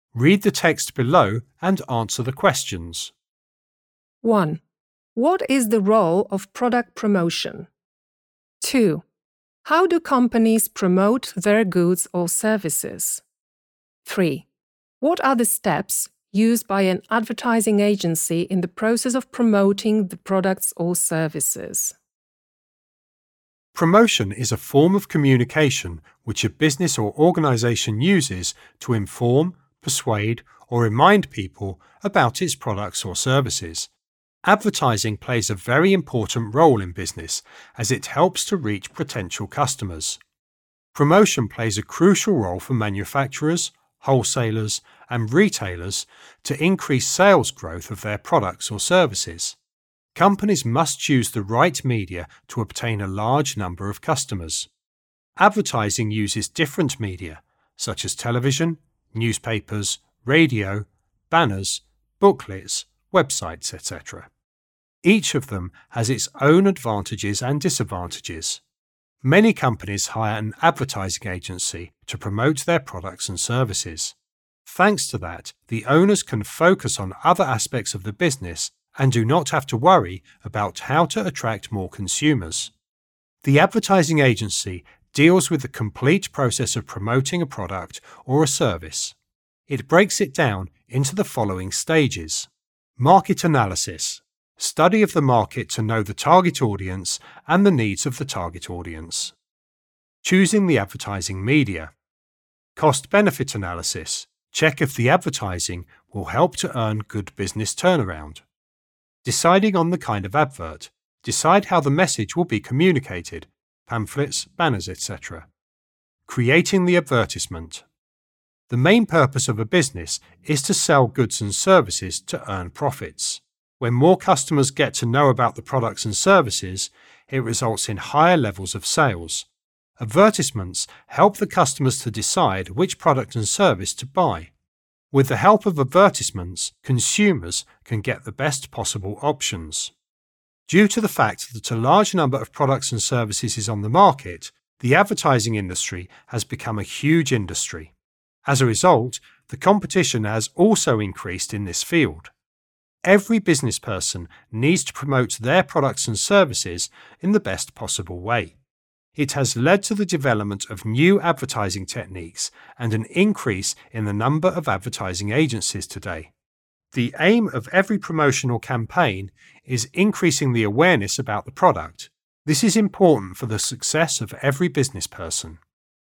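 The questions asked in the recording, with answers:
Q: What is the role of product promotion?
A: To inform, persuade, or remind people about products or services and increase sales

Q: How do companies promote their goods or services?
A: Through advertising in media such as TV, newspapers, radio, banners, websites, often via an advertising agency

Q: What are the steps used by an advertising agency in the process of promoting the products or services?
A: Market analysis, choosing the media, cost-benefit analysis, deciding on the kind of advert, creating the advertisement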